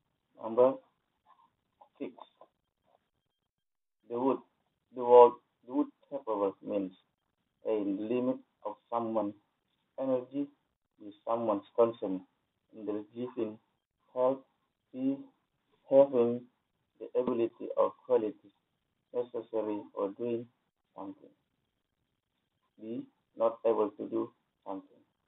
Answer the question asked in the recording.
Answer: the correct answer is having the ability or qualities necessary for doing something.